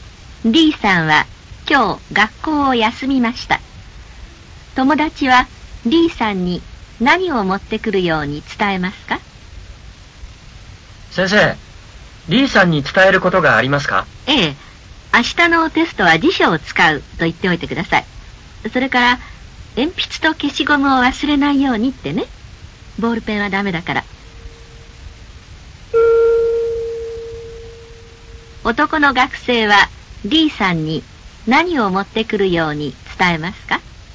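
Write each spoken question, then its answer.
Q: 男の学生は D さんに何を持ってくるように伝えますか?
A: 辞書と鉛筆と消しゴム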